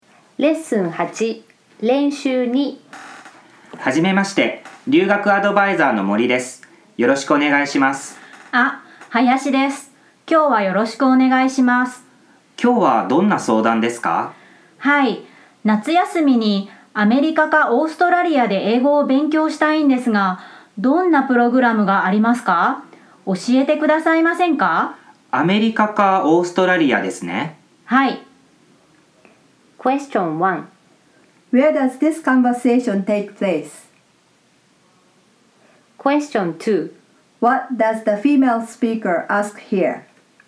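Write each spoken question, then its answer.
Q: Where does this conversation take place?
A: At a study-abroad advisor's office (a consultation with the advisor, Mori)

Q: What does the female speaker ask here?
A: What English study programs there are in America or Australia for the summer break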